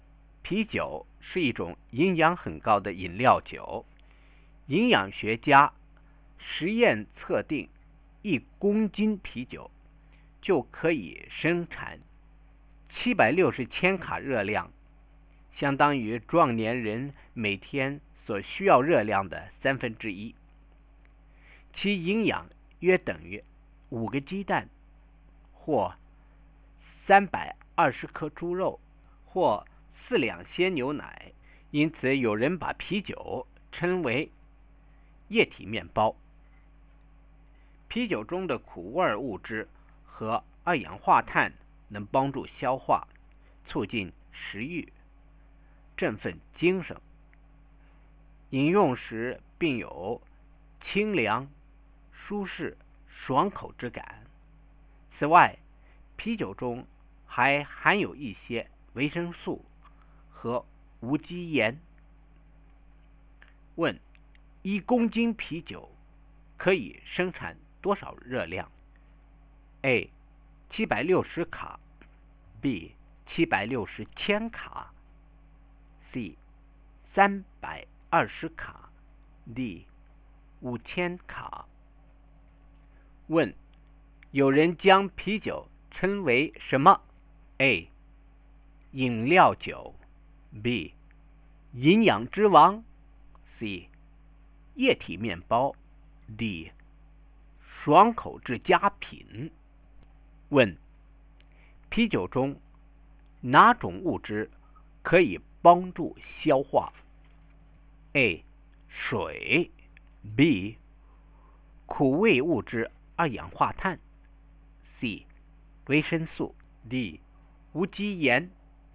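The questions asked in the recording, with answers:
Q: 一公斤啤酒可以生产多少热量?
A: B: 760千卡

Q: 有人将啤酒称为什么?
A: C: 液体面包

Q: 啤酒中哪种物质可以帮助消化?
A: B: 苦味物质二氧化碳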